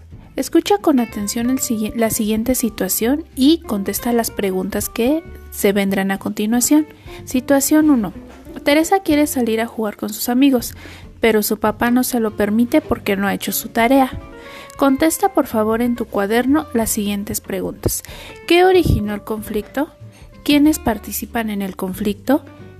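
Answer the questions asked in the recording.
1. Teresa quiere salir a jugar, pero su papá no se lo permite porque no ha hecho su tarea
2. Teresa y su papá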